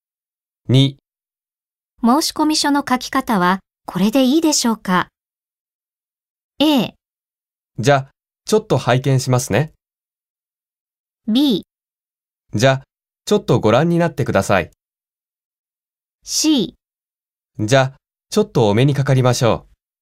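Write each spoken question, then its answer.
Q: 申し込み書の書き方はこれでいいでしょうか?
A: A: じゃあ、ちょっと拝見しますね。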